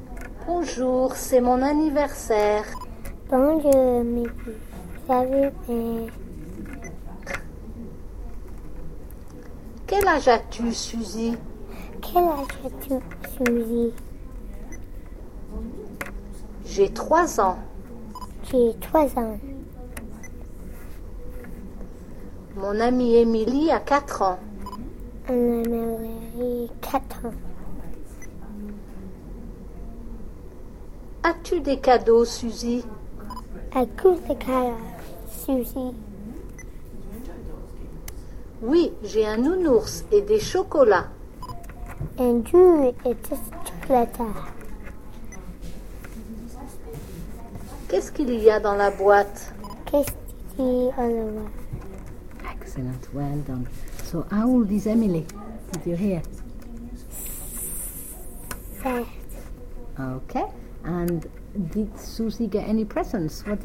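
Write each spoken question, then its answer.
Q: Okay, and did Susie get any presents?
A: Yes, a teddy bear and chocolates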